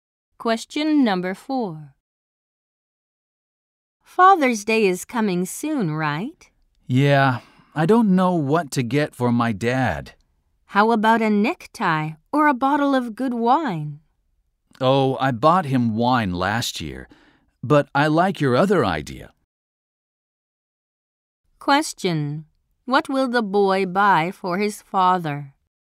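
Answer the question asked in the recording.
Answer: A necktie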